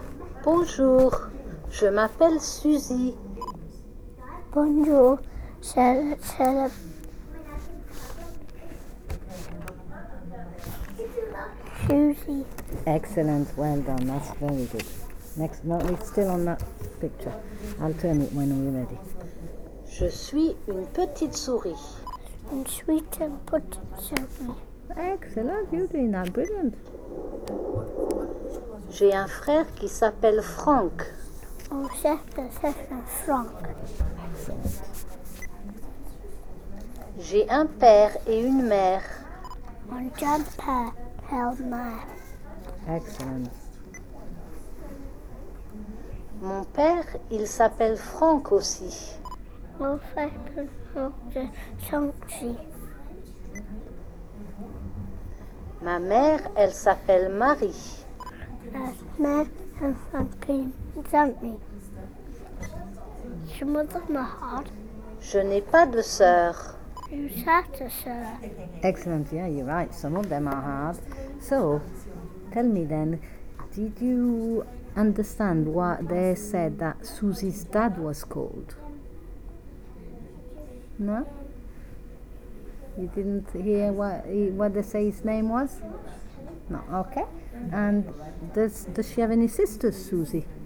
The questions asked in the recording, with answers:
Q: And does she have any sisters, Suzy?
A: No sister.